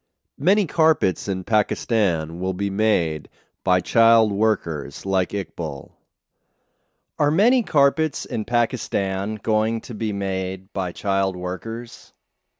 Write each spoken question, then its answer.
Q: Are many carpets in Pakistan going to be made by child workers?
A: Yes, many carpets in Pakistan are going to be made by child workers.